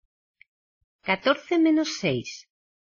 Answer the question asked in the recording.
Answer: Eight.